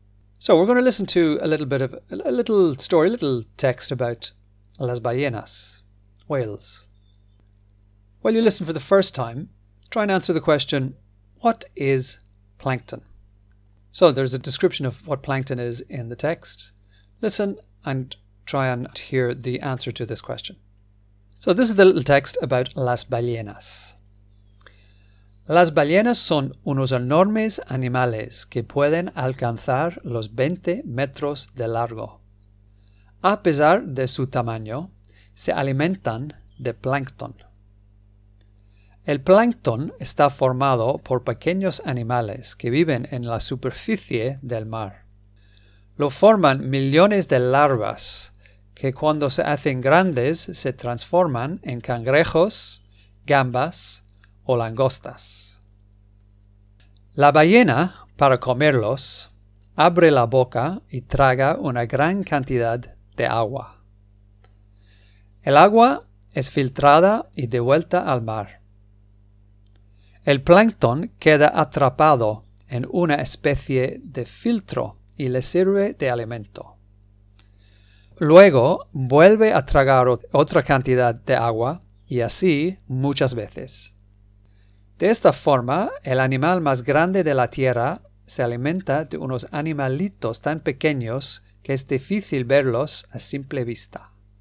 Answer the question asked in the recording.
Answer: So, plankton is formed by small animals que viven en la superficie del mar, that live on the surface of the sea lo forman millones de larvas.